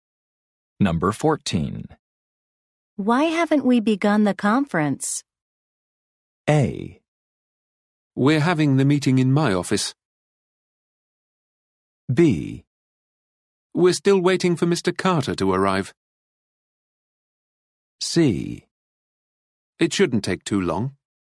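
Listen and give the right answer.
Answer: B: We're still waiting for Mr. Carter to arrive.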